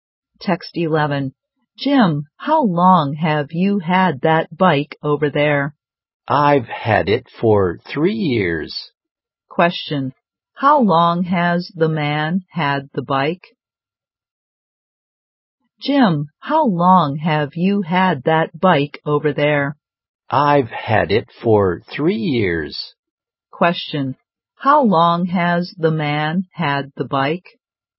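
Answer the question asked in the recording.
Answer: For 3 years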